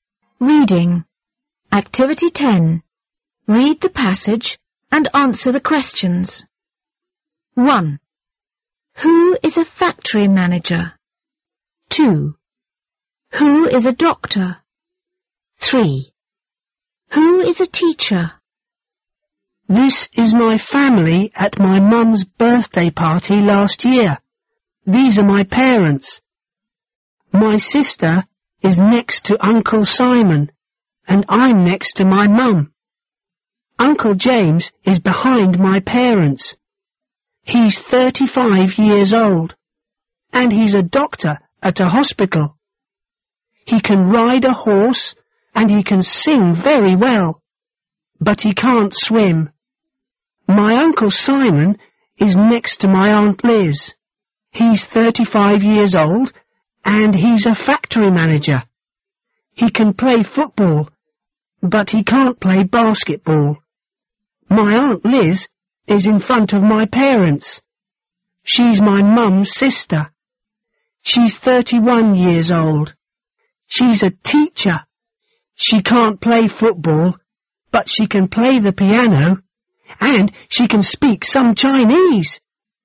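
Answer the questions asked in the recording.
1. Uncle Simon
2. Uncle James
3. Aunt Liz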